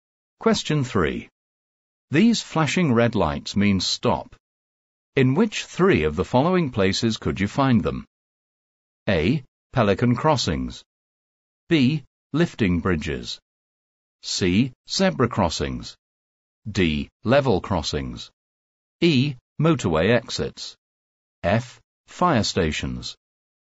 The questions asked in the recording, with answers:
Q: In which three of the following places could you find them?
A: The correct answers are B. Lifting bridges. D. Level crossings. F. Fire stations.